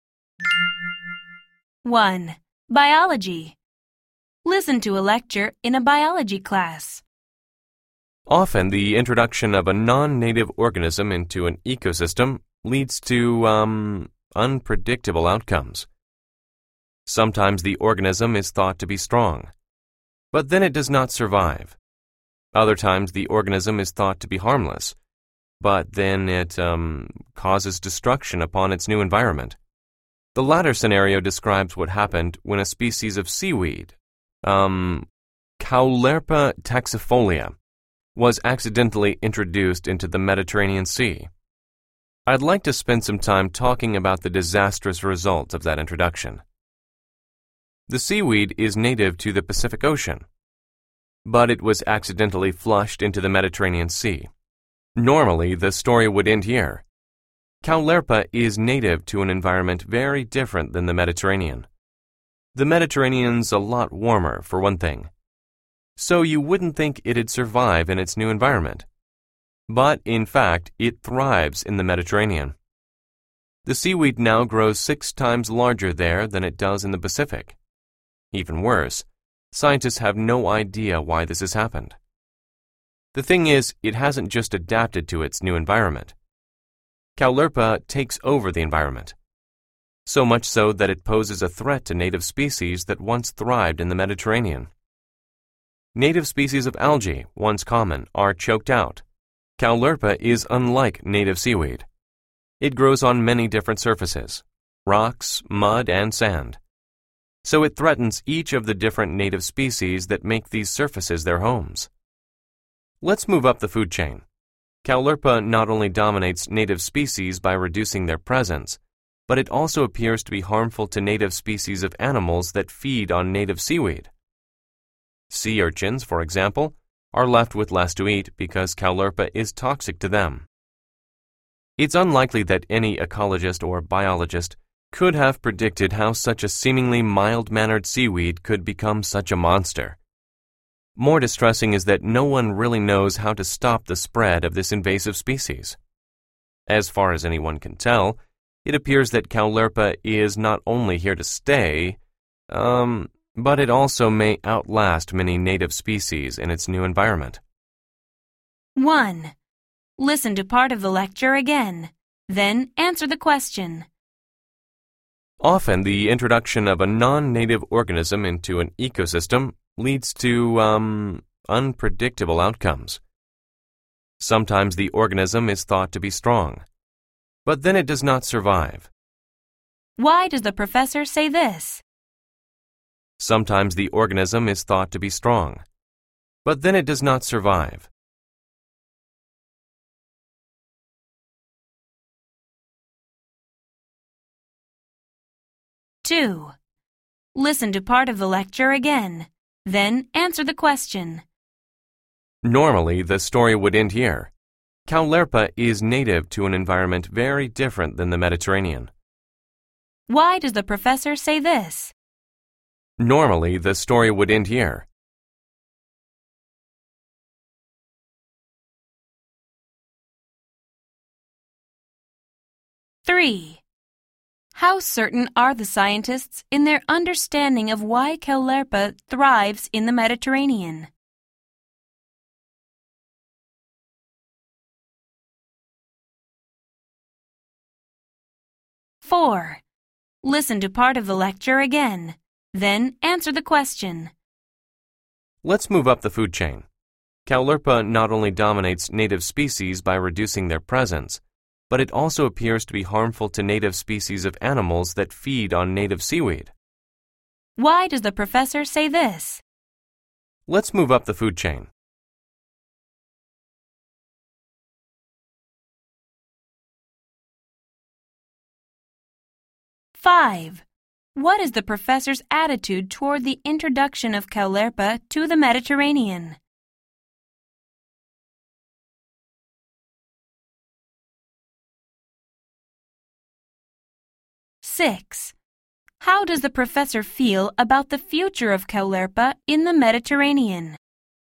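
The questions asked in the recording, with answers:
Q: How certain are the scientists in their understanding of why Caulerpa thrives in the Mediterranean?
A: Not certain at all; they have no idea why

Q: How does the professor feel about the future of Caulerpa in the Mediterranean?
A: Pessimistic; it is likely to stay and may outlast native species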